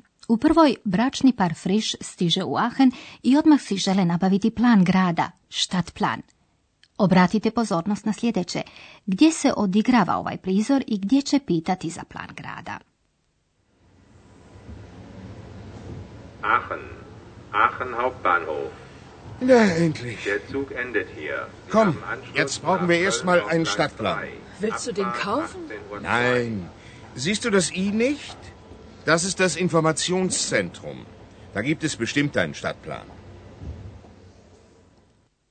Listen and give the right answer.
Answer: Vjerojatno ste po razglasu prepoznali da se ovaj prizor odigrava na Ahenskom glavnom željezničkom kolodvoru.